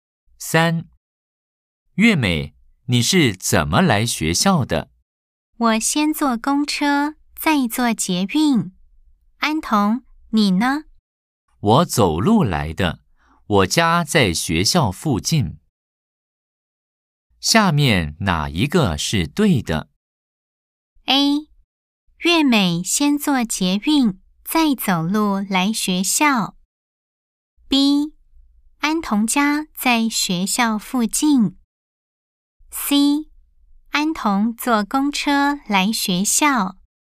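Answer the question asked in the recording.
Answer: B: 安童家在学校附近。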